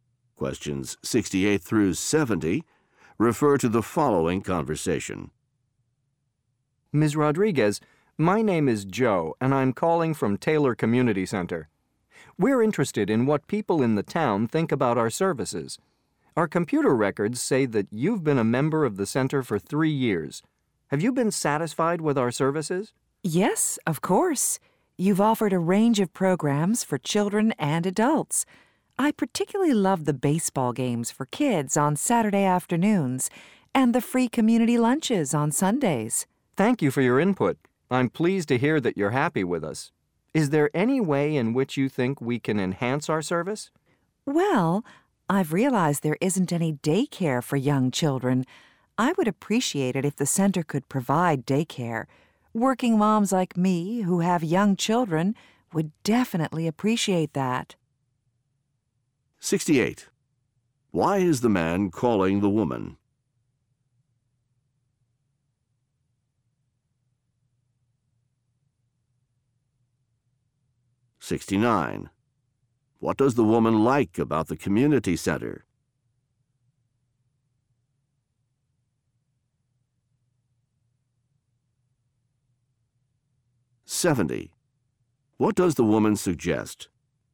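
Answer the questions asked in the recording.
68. To ask her opinion of the center's services
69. Kids' baseball games and free Sunday lunches
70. Providing daycare for young children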